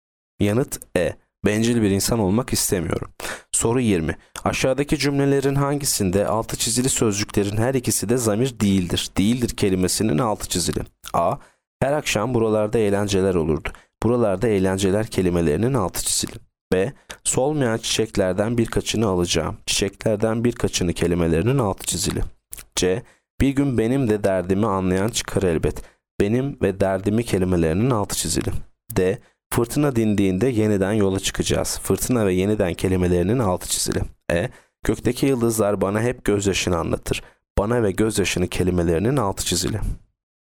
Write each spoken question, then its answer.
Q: Aşağıdaki cümlelerin hangisinde altı çizili sözcüklerin her ikisi de zamir değildir?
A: Yanıt D. Fırtına dindiğinde yeniden yola çıkacağız.